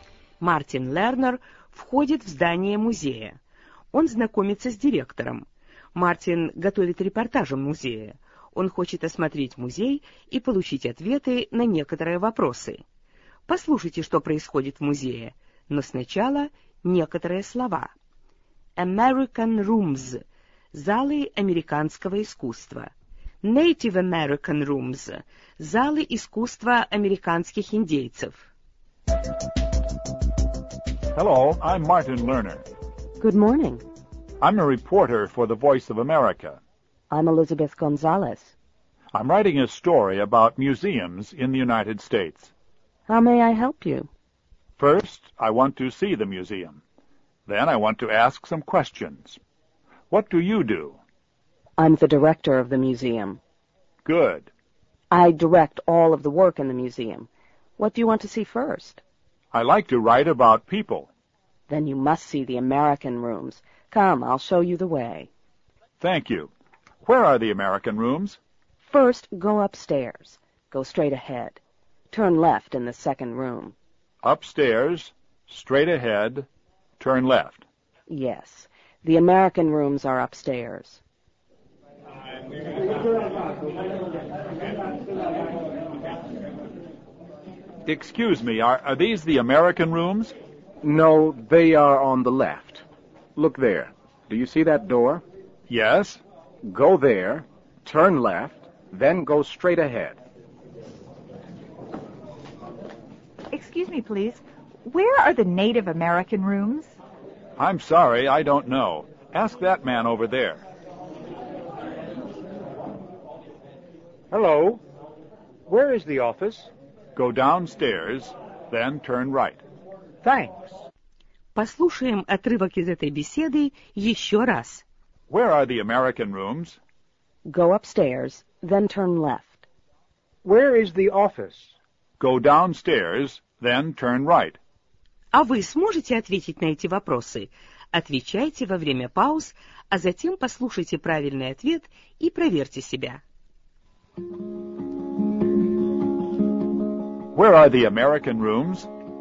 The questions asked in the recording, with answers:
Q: Where are the American rooms?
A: Go upstairs, then turn left.